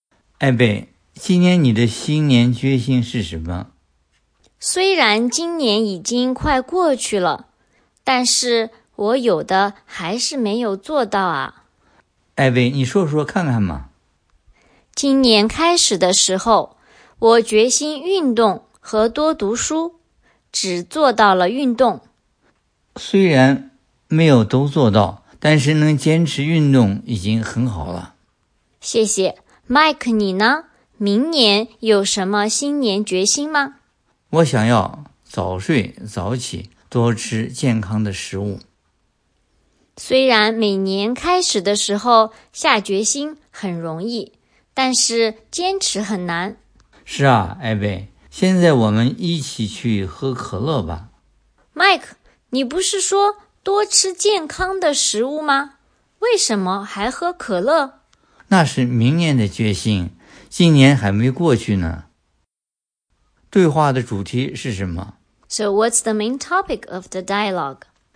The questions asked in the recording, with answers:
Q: 对话的主题是什么?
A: 艾贝和麦克谈新年决心。